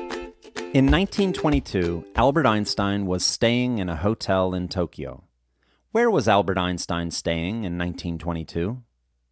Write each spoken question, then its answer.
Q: Where was Albert Einstein staying in 1922?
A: Albert Einstein was staying in a hotel in Tokyo in 1922.